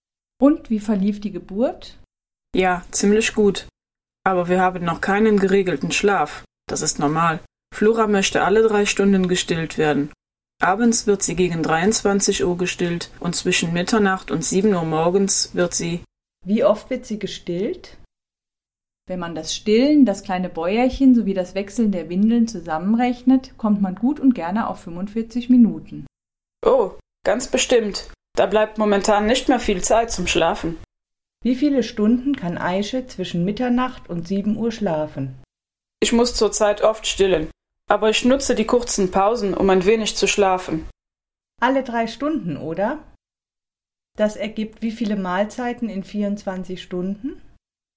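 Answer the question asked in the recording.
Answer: 8 Mahlzeiten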